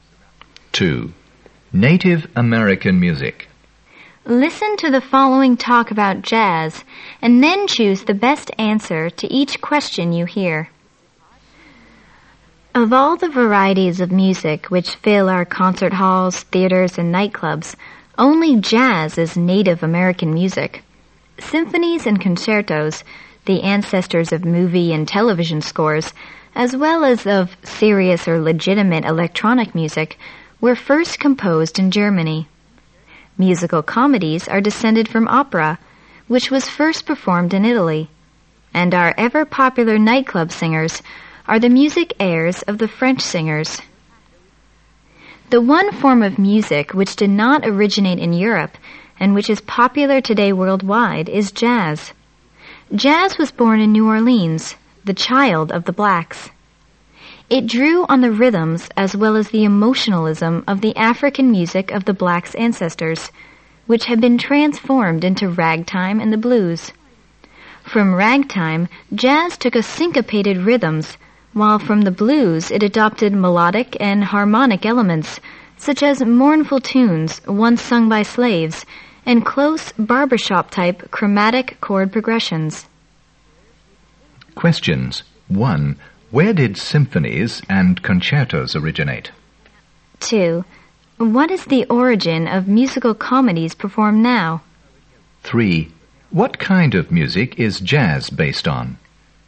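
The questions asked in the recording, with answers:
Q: Where did symphonies and concertos originate?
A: In Germany

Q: What is the origin of musical comedies performed now?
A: Opera, first performed in Italy

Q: What kind of music is jazz based on?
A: The African music of black people's ancestors, through ragtime and the blues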